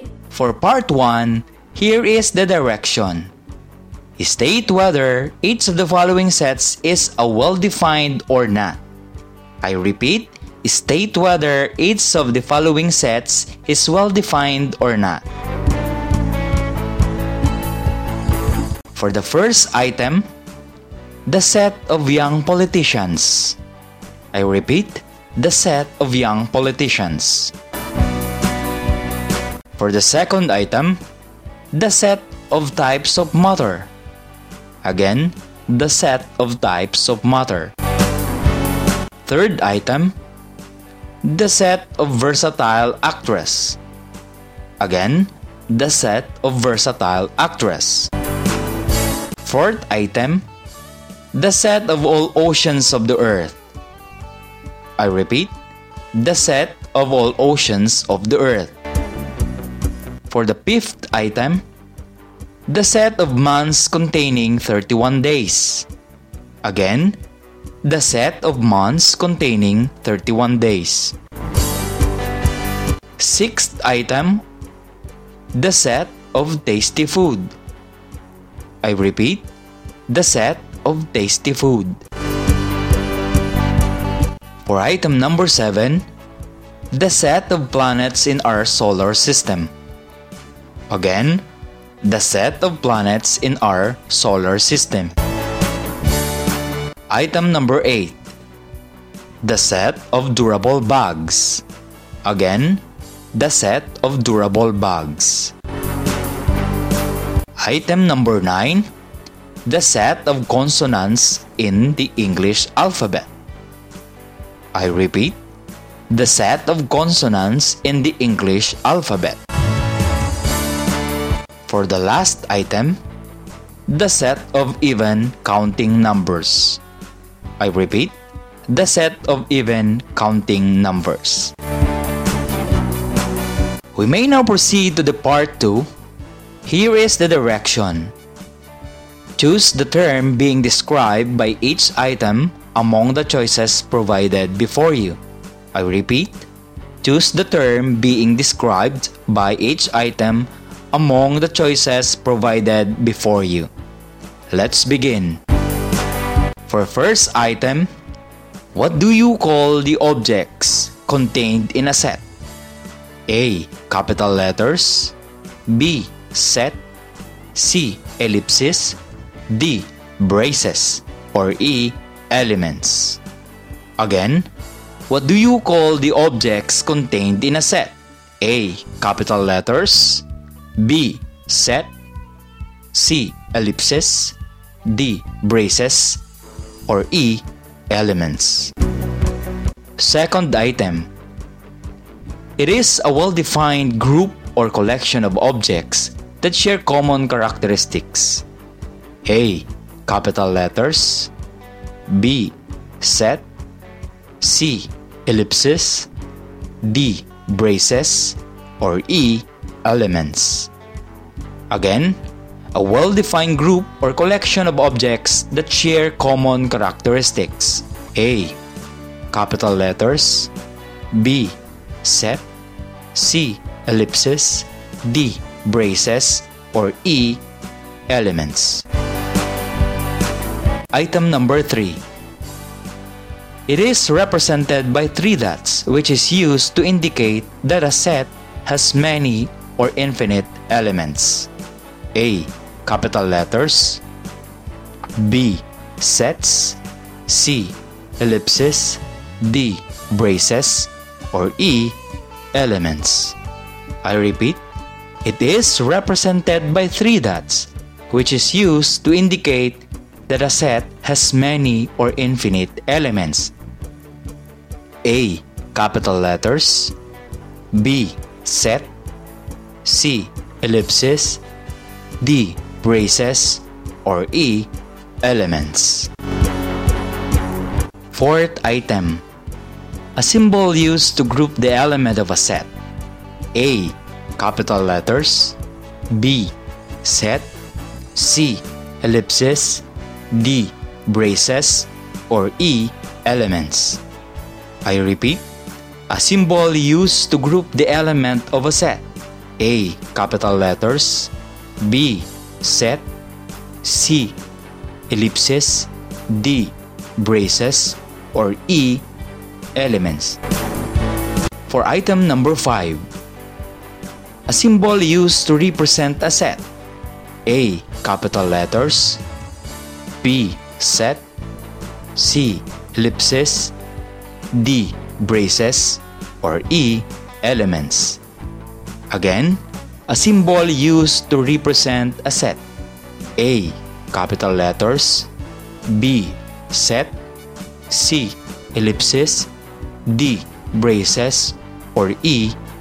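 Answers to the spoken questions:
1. not well-defined
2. well-defined
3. not well-defined
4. well-defined
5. well-defined
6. not well-defined
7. well-defined
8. not well-defined
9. well-defined
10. well-defined
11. E: Elements
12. B: Set
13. C: Ellipses
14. D: Braces
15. A: Capital letters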